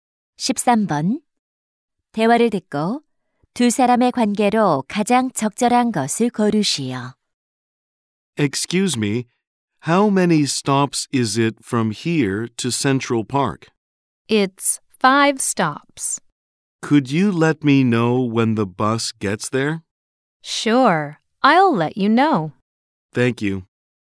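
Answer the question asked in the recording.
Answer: 승객과 버스 기사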